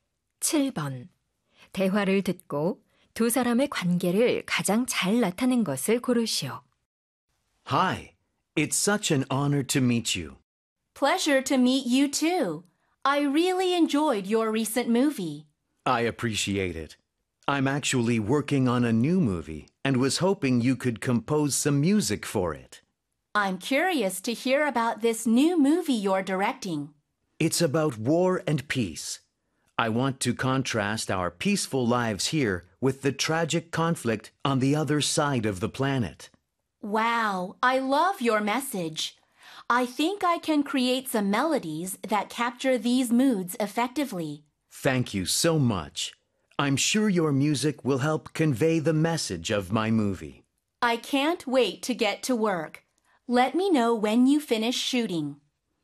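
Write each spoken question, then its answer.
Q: 대화를 듣고 두 사람의 관계를 가장 잘 나타낸 것을 고르시오.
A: 작곡가 - 영화감독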